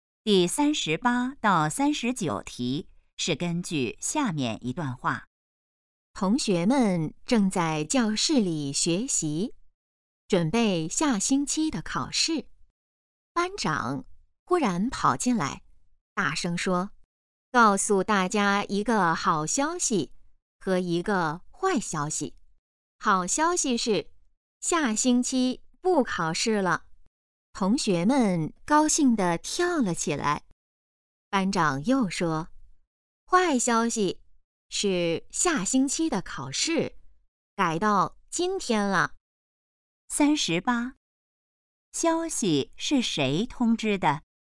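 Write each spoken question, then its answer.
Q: 消息是谁通知的?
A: 班长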